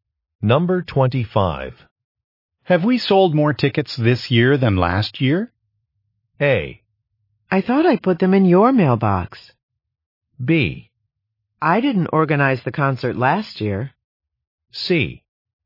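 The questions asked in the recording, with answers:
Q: Have we sold more tickets this year than last year?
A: B: I didn't organize the concert last year.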